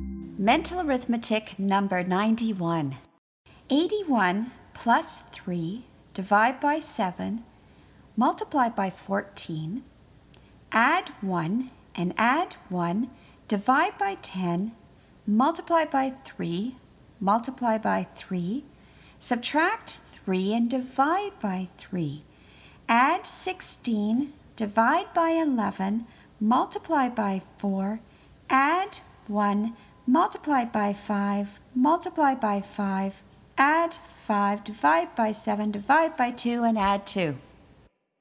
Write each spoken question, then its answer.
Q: 81 plus 3, divide by 7, multiply by 14, add 1 and add 1, divide by 10, multiply by 3, multiply by 3, subtract 3 and divide by 3, add 16, divide by 11, multiply by 4, add 1, multiply by 5, multiply by 5, add 5, divide by 7, divide by 2, and add 2.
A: And the answer is 47.